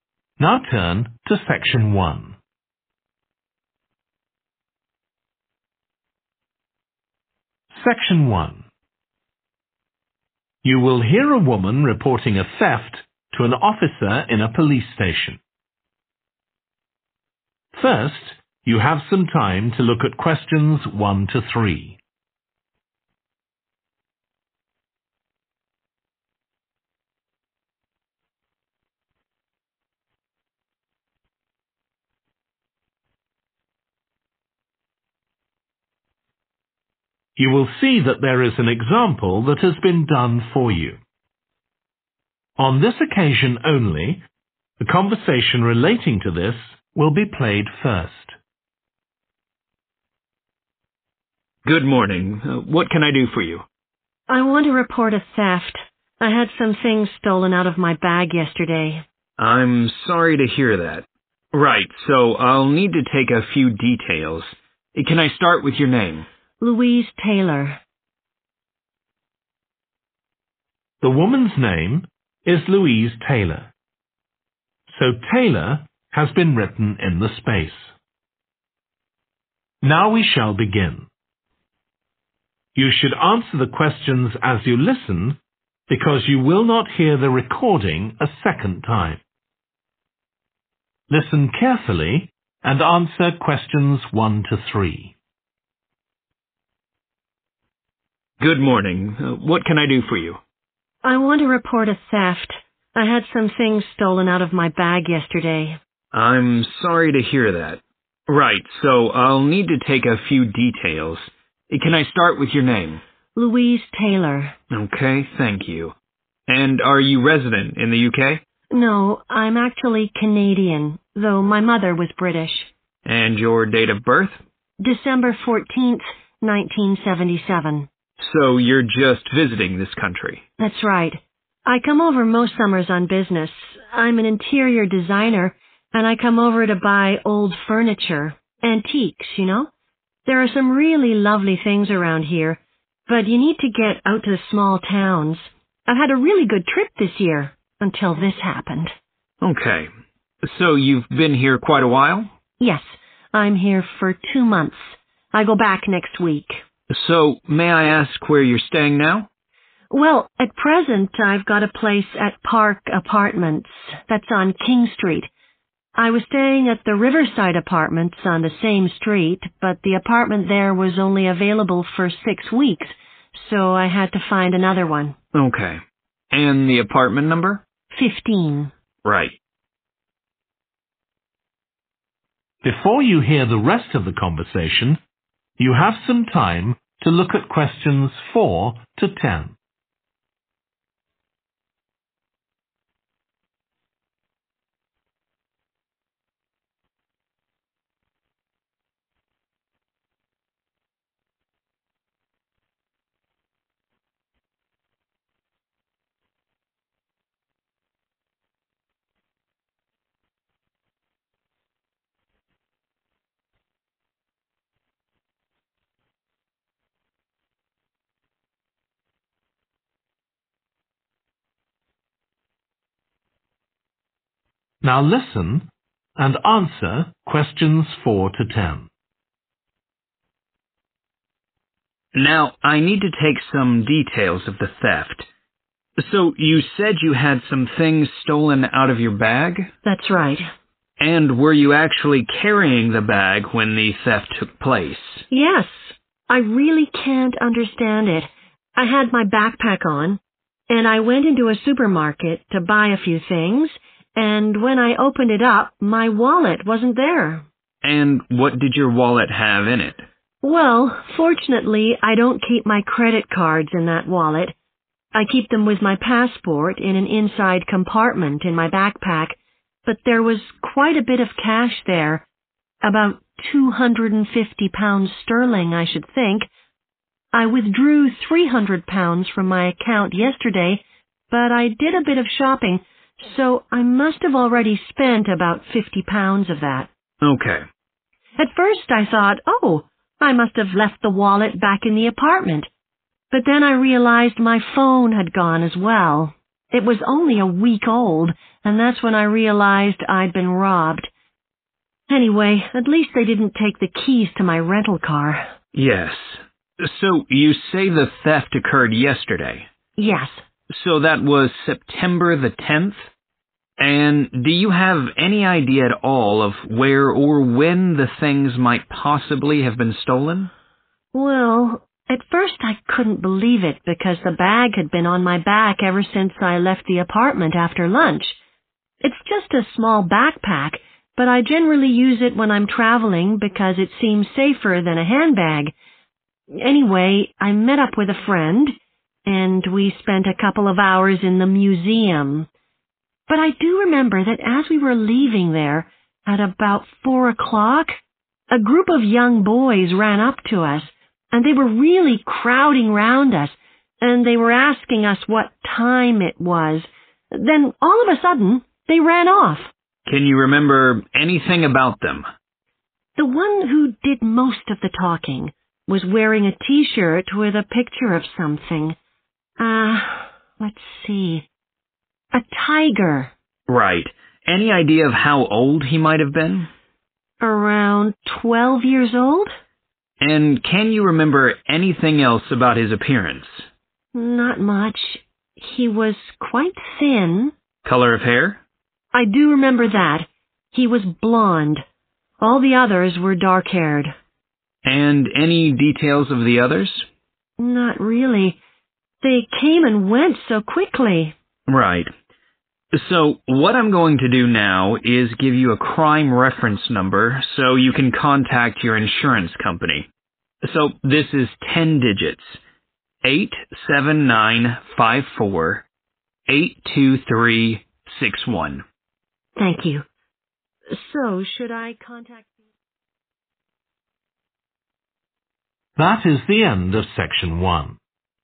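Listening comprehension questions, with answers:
Complete the form below. Write ONE WORD AND/OR A NUMBER for each answer.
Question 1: Nationality 1 .........................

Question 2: Reason for visit business (to buy antique 2 ..............)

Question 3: Current address 3 ................. Apartments (No 15)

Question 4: a wallet containing approximately £4...............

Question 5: a 5......................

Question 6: Date of theft 6 .........................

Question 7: Location outside the 7 ................... at about 4 pm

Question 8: some boys asked for the 8 ................ then ran off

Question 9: he was about 12, slim build with 9 ................hair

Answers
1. Canadian
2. furniture
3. Park
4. 250
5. phone
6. 10 September
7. museum
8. time
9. blonde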